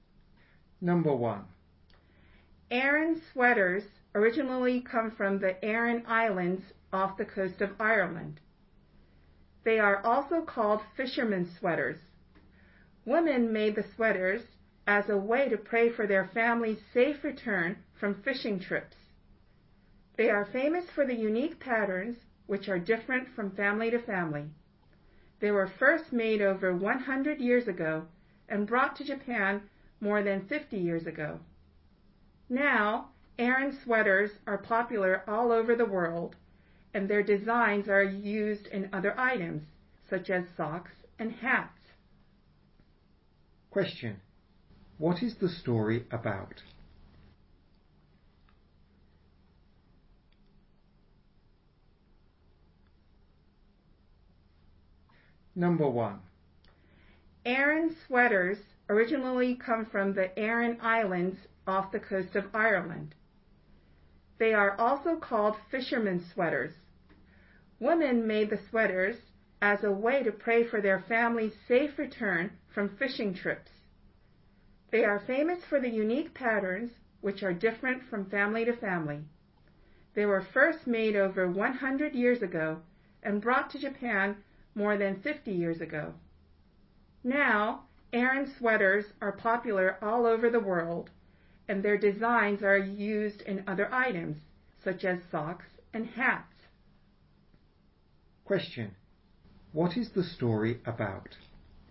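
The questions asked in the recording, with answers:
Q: What is the story about?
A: Aran sweaters.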